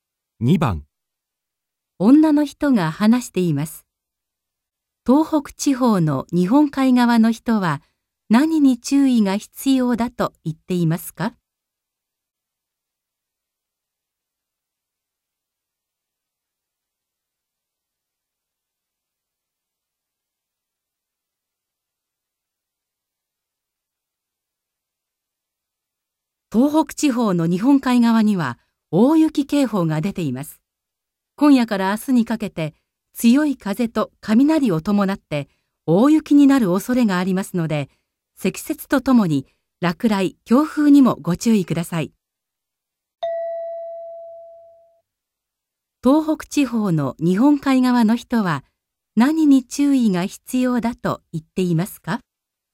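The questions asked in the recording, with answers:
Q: 東北地方の日本海側の人は何に注意が必要だと言っていますか?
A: 大雪(積雪)と落雷、強風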